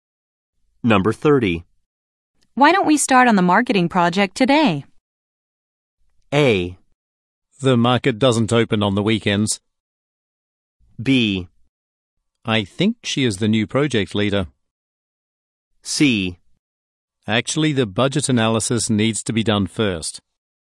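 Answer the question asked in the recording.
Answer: C: Actually, the budget analysis needs to be done first.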